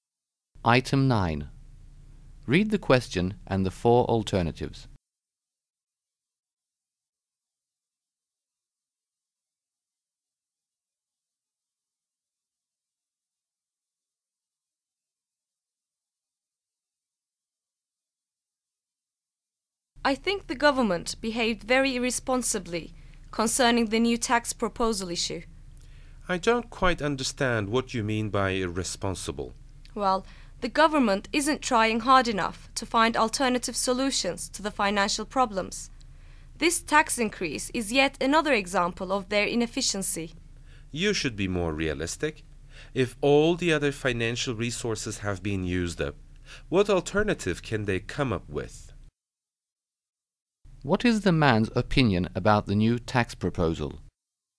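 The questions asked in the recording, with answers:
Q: What is the man's opinion about the new tax proposal?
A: It is unavoidable since there is no other alternative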